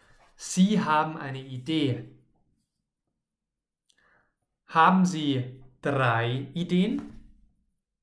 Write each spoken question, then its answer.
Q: Haben Sie drei Ideen?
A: Nein, Sie haben nicht drei Ideen.